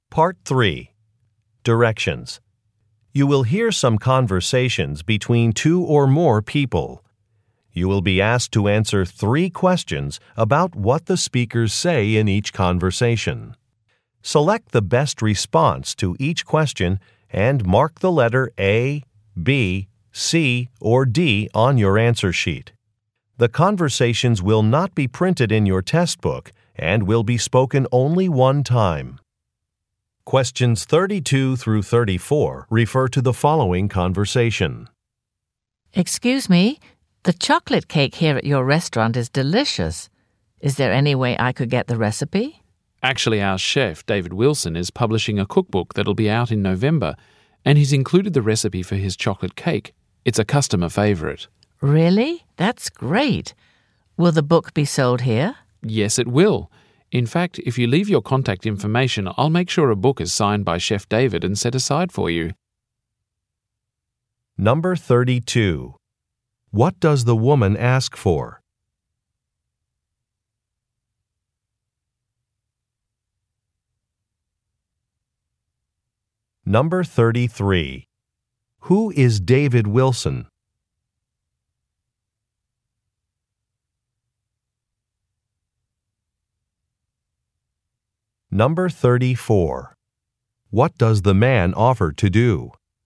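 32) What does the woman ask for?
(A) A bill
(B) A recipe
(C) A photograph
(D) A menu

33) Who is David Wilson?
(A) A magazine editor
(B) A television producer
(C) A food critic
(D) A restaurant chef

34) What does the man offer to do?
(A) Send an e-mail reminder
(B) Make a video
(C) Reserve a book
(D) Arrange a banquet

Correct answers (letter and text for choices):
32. (B) A recipe
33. (D) A restaurant chef
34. (C) Reserve a book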